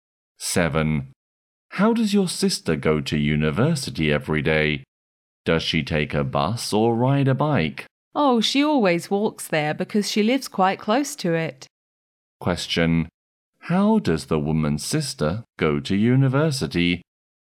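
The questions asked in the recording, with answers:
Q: How does the woman's sister go to university?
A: She walks there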